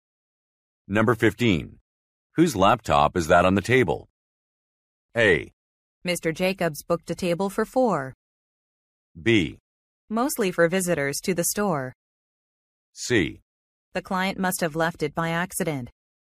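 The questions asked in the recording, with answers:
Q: Whose laptop is that on the table?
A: C: The client must have left it by accident.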